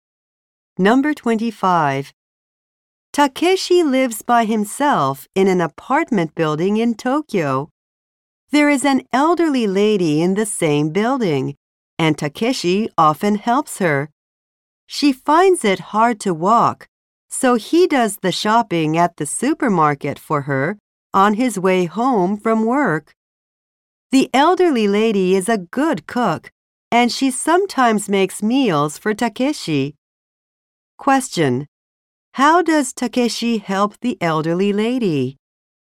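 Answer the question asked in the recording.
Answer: He does her shopping at the supermarket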